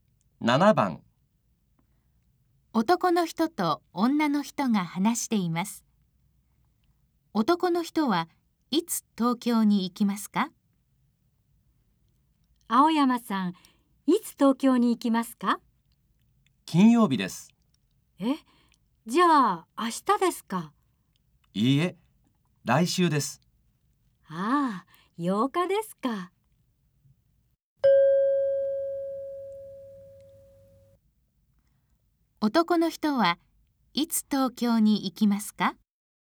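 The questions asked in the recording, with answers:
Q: 男の人はいつ東京に行きますか?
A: 来週の金曜日(8日)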